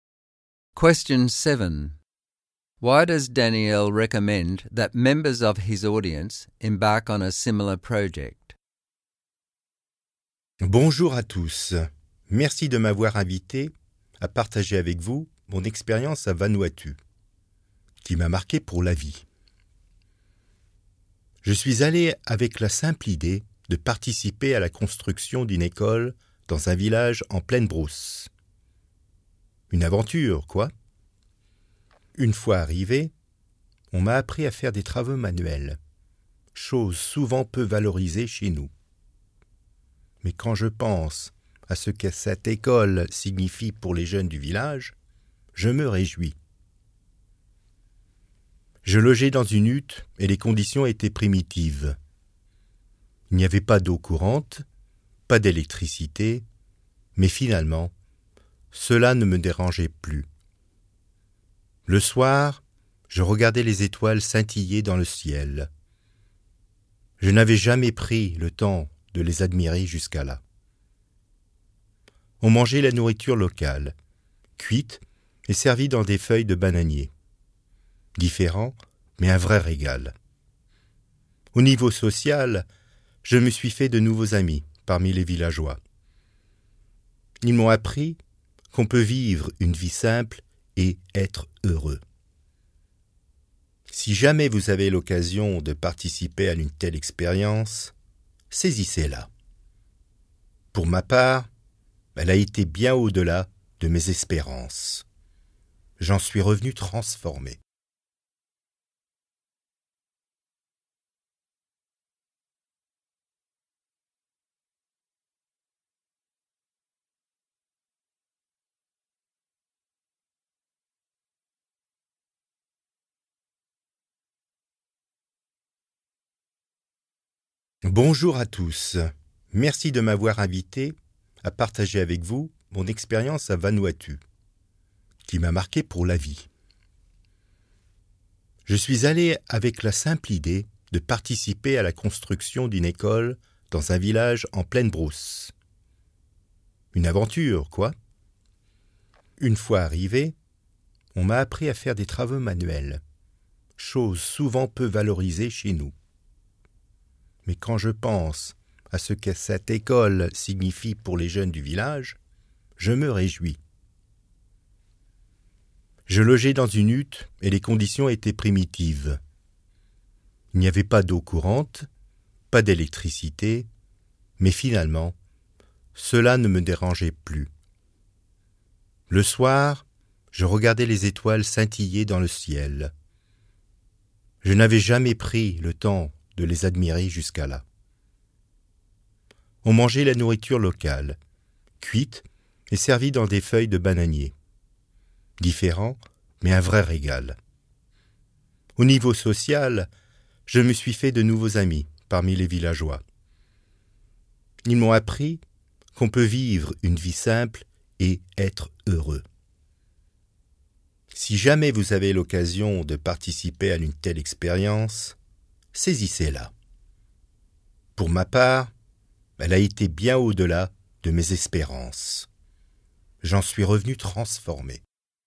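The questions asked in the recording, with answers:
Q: Why does Daniel recommend that members of his audience embark on a similar project?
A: It went far beyond his expectations and changed him: he learned manual skills, helped build a school for the village children, enjoyed simple living and local food, made friends and learned that you can live simply and be happy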